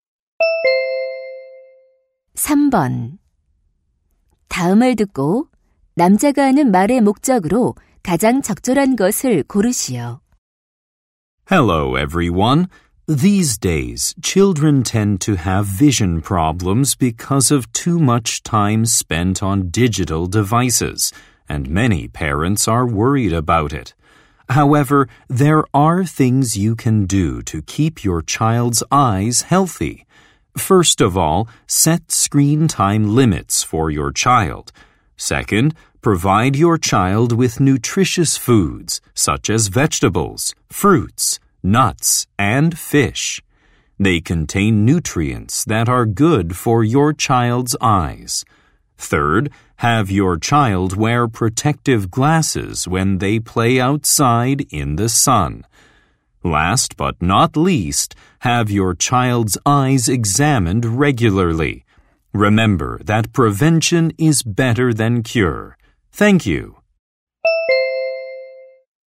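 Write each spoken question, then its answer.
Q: 다음을 듣고 남자가 하는 말의 목적으로 가장 적절한 것을 고르시오.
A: 자녀의 눈 건강을 지키는 방법을 알려 주려고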